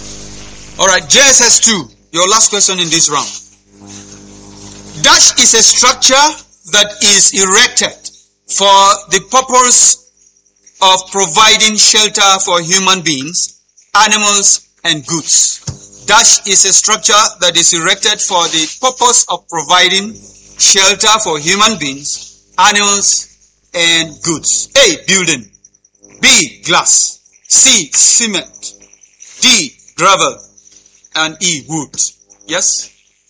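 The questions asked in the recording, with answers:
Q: Dash is a structure that is erected for the purpose of providing shelter for human beings, animals, and goods.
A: A: Building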